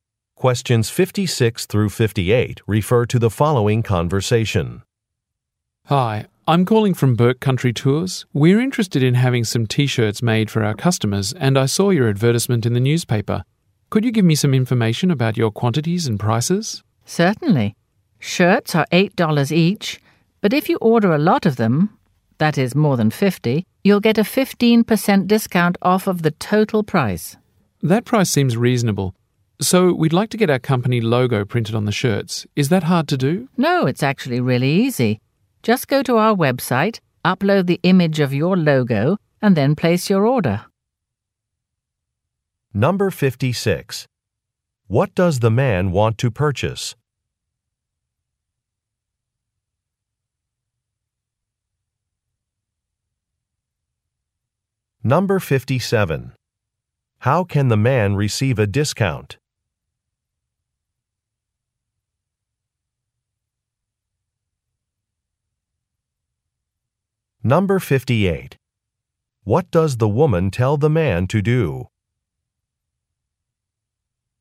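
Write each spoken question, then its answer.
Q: What does the man want to purchase?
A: T-shirts

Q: How can the man receive a discount?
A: Order more than 50 shirts

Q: What does the woman tell the man to do?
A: Upload the logo on the website and order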